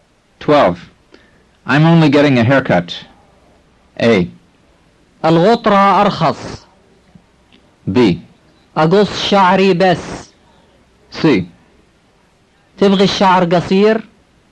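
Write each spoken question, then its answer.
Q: I'm only getting a haircut.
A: B: أقص شعري بس.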